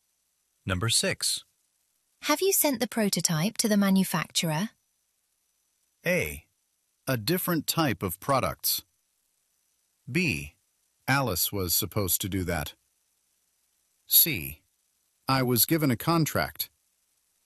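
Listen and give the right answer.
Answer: B: Alice was supposed to do that.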